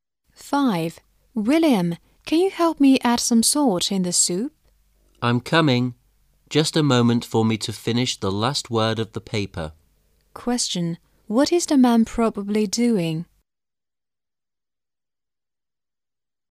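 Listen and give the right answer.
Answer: Writing a paper

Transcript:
[解析] W: William, can you help me add some salt in the soup? M: I'm coming! Just a moment for me to finish the last word of the paper. Q: What is the man probably doing?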